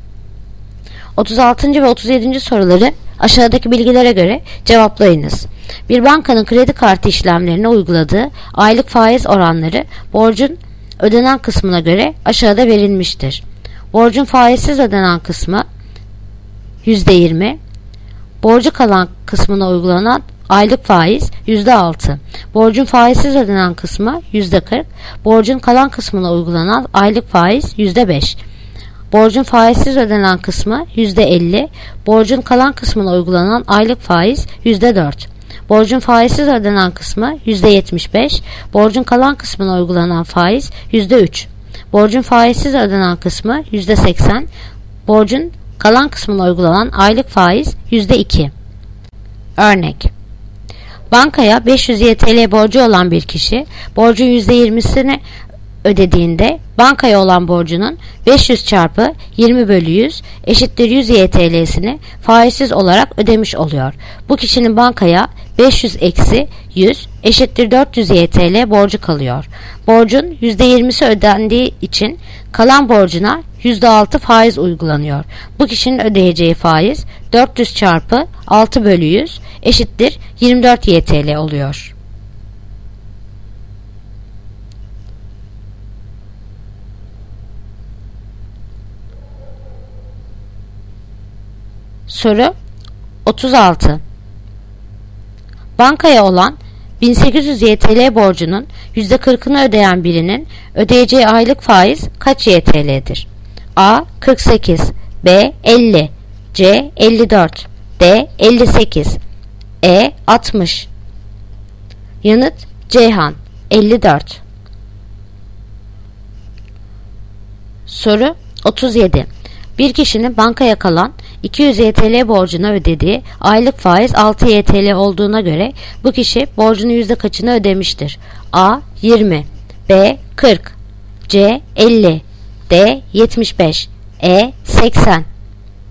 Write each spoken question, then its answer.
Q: Bankaya olan 1800 TL borcunun %40'ını ödeyen birinin ödeyeceği aylık faiz kaç TL'dir?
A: Yanıt: Ceyhan, 54.

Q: Bir kişinin bankaya kalan 200 TL borcuna ödediği aylık faiz 6 TL olduğuna göre bu kişi borcunun yüzde kaçını ödemiştir?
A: Yanıt: Diyarbakır, 75.